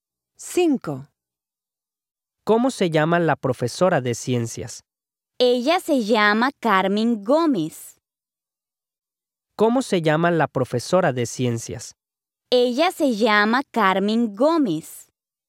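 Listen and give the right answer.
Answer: A: logical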